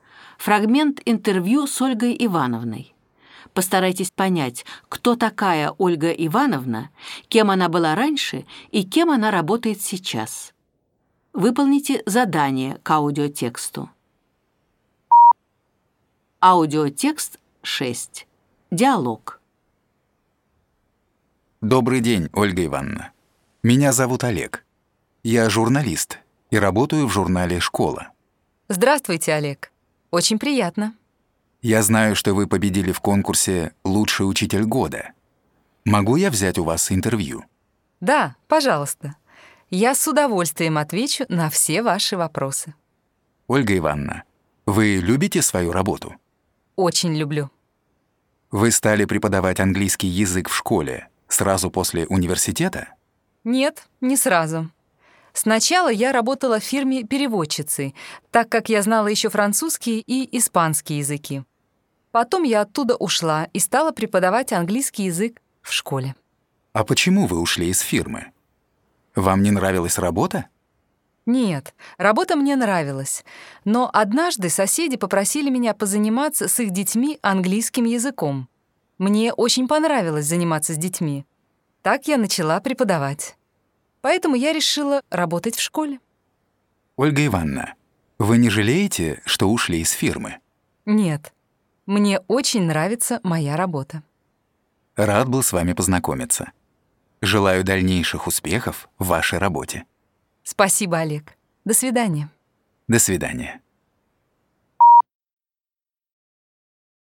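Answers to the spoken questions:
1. учительница английского языка, победитель конкурса «Лучший учитель года»
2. переводчицей в фирме
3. учительницей английского языка в школе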